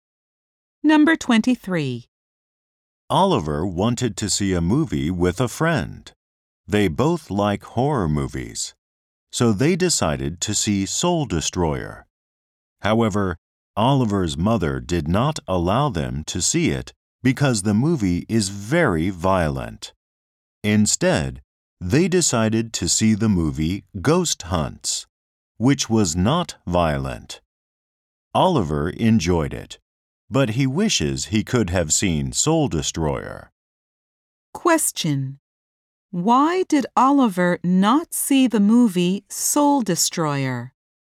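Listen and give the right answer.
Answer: His mother did not allow it because it is very violent.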